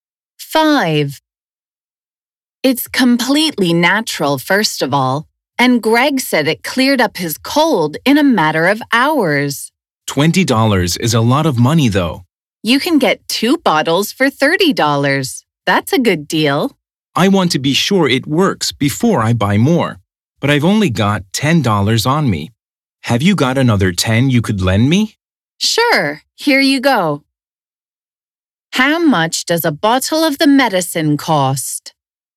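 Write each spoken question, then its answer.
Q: How much does a bottle of the medicine cost?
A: $20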